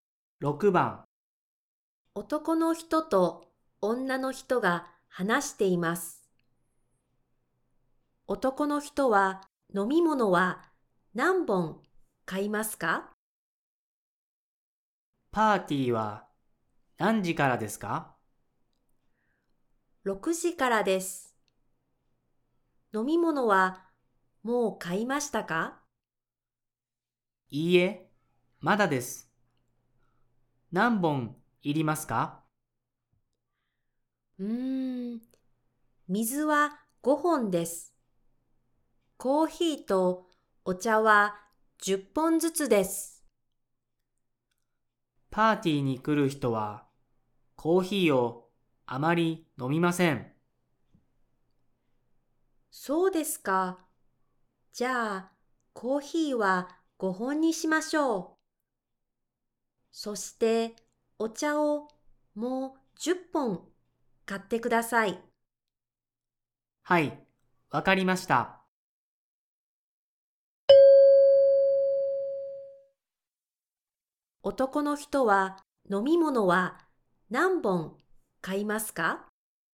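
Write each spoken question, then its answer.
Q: 男の人は飲み物は何本買いますか?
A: 30本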